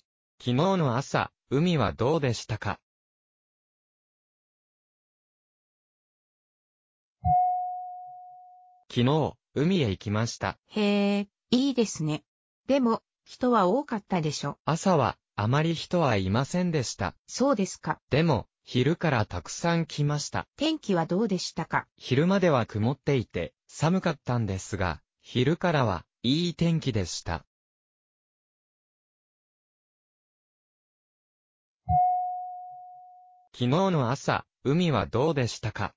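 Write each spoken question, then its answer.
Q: 昨日の朝、海はどうでしたか?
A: 人はあまりいなくて、曇っていて寒かった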